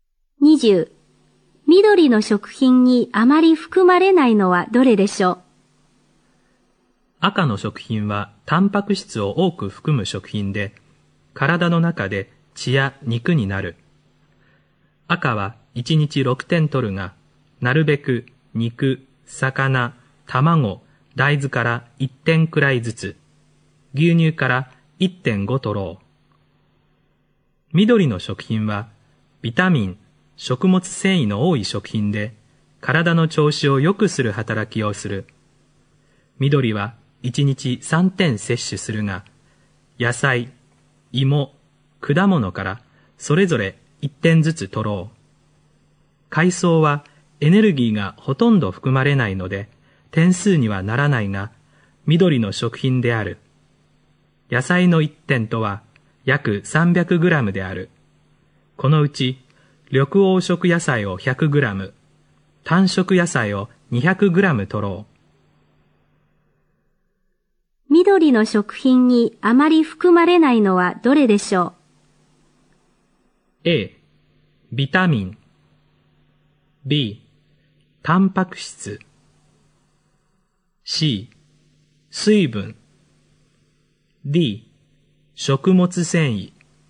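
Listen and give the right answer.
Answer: B: タンパク質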